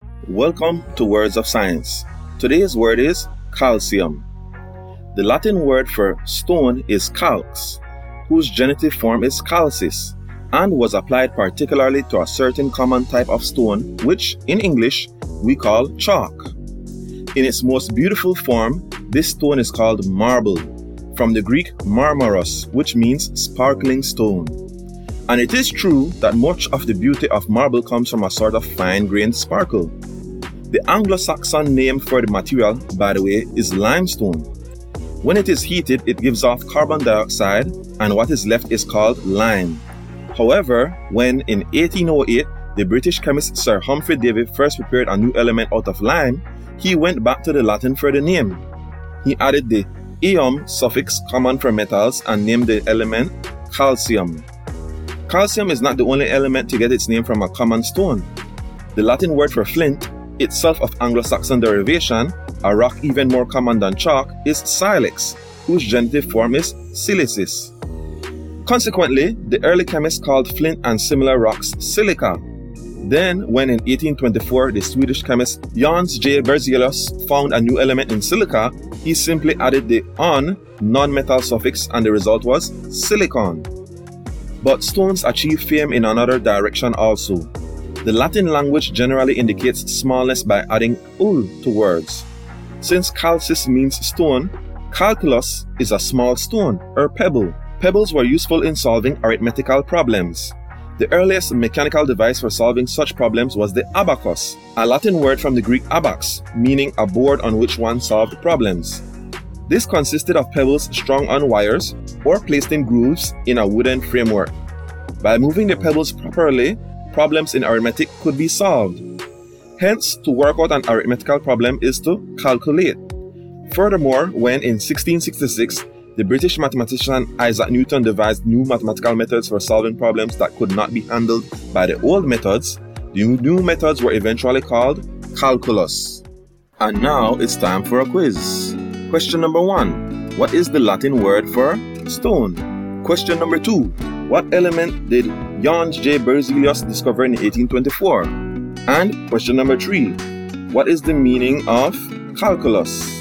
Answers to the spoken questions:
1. calx.
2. silicon.
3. small stone or pebble.